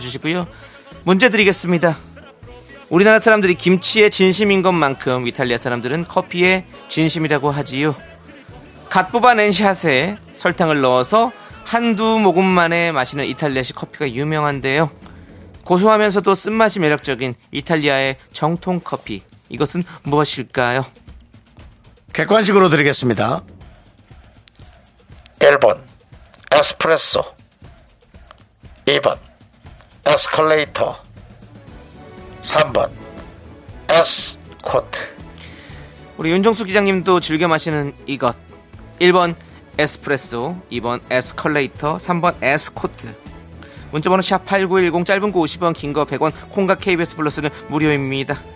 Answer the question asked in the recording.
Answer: 정답은 1번 에스프레소입니다